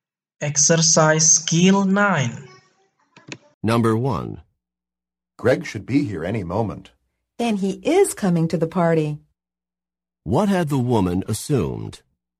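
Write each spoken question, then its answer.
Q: What had the woman assumed?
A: That Greg was not coming to the party.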